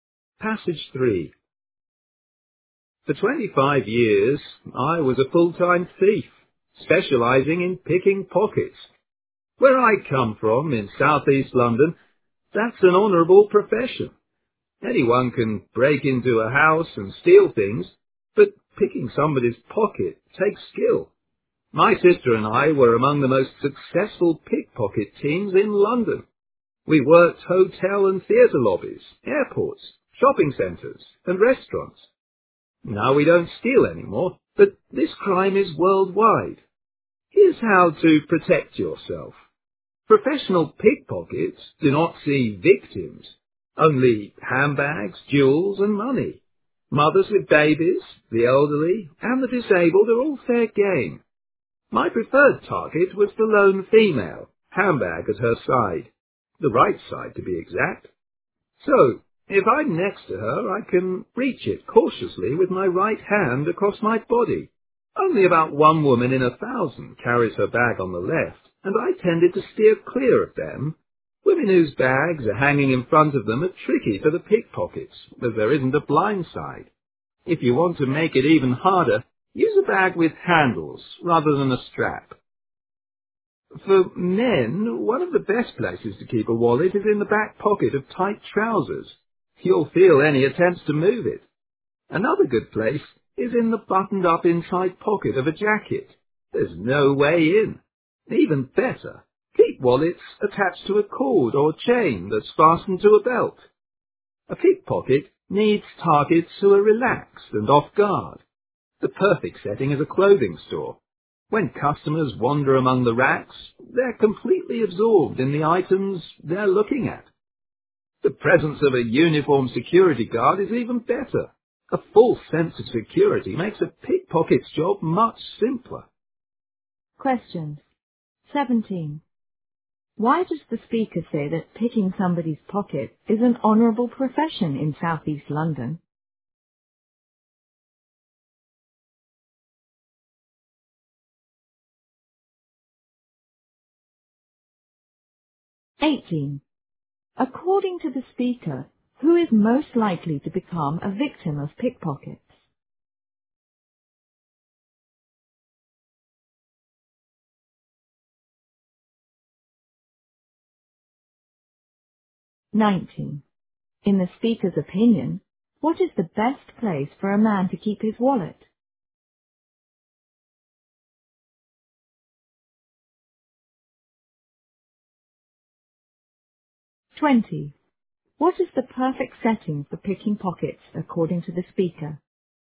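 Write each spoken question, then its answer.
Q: Why does the speaker say that picking somebody's pocket is an honourable profession in Southeast London?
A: Because it takes skill

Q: According to the speaker, who is most likely to become a victim of pickpockets?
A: A woman alone with a handbag on her right side

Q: What is the perfect setting for picking pockets according to the speaker?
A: A clothing store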